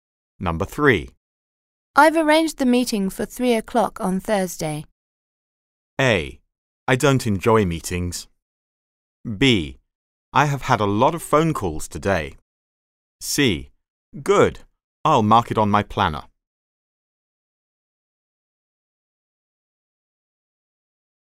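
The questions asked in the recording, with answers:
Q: I've arranged the meeting for 3 o'clock on Thursday.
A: C: Good. I'll mark it on my planner.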